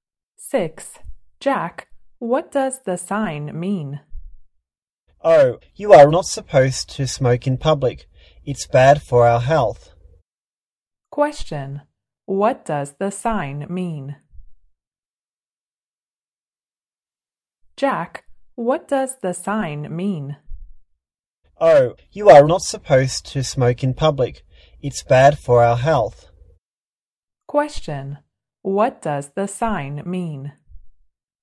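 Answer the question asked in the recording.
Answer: You are not supposed to smoke in public.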